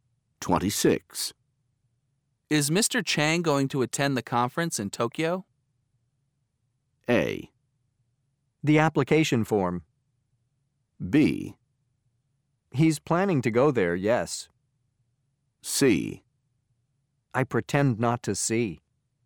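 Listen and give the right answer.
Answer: B: He's planning to go there, yes.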